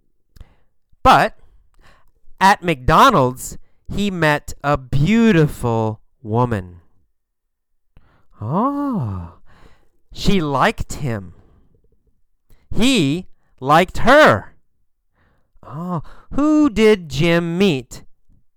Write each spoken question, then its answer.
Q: Oh, who did Jim meet?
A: Jim met a beautiful woman.